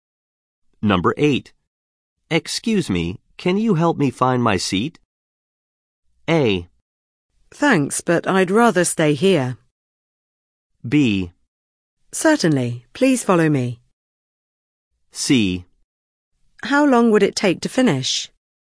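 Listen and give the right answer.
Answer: B: Certainly, please follow me.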